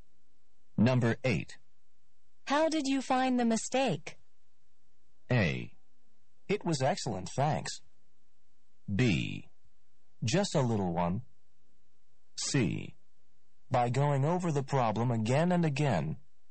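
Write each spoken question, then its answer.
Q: How did you find the mistake?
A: C: By going over the problem again and again.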